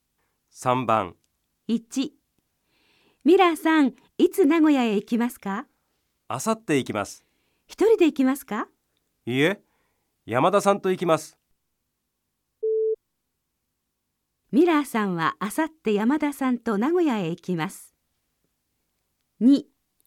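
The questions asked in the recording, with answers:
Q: ミラーさんはあさって山田さんと名古屋へ行きます。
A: 正しい(○)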